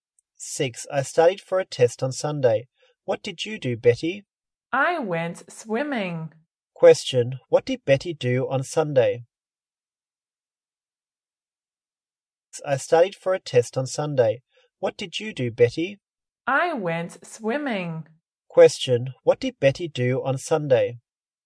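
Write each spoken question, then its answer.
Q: what did Betty do on Sunday?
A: She went swimming.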